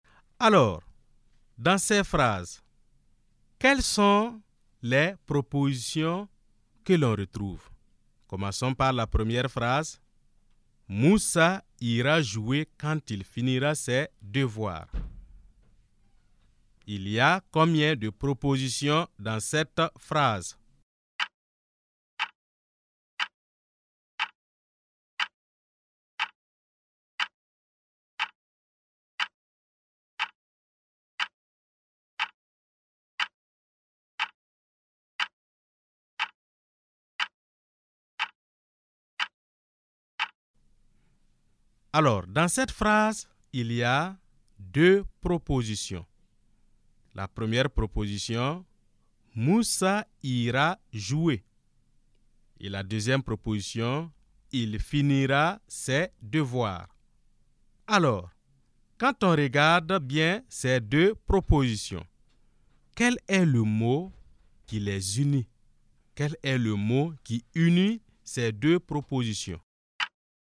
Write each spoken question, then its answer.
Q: Il y a combien de propositions dans cette phrase?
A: Alors, dans cette phrase, il y a deux propositions.